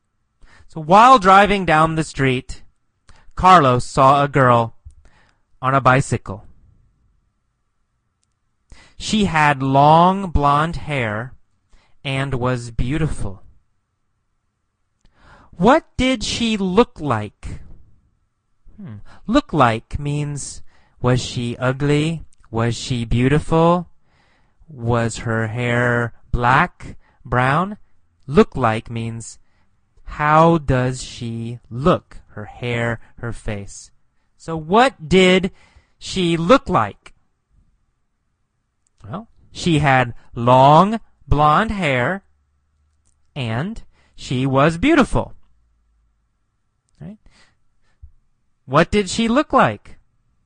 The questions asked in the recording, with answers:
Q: What did she look like?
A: She had long blonde hair and she was beautiful.